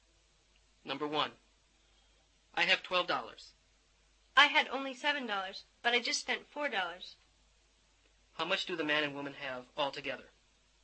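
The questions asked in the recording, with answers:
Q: How much do the man and woman have altogether?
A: $15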